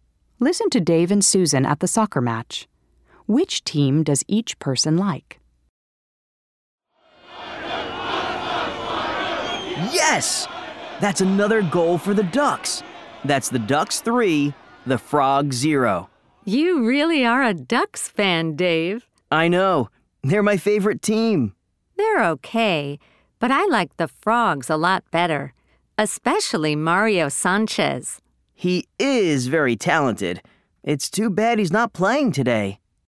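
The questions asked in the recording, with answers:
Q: Which team does each person like?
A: Dave likes the Ducks; Susan likes the Frogs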